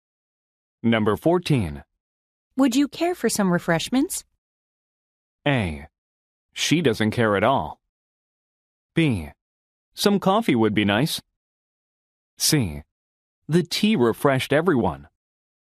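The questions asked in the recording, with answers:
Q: Would you care for some refreshments?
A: B: Some coffee would be nice.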